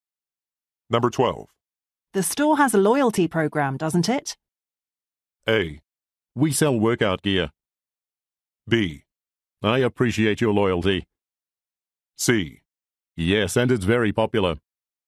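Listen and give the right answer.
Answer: C: Yes, and it's very popular.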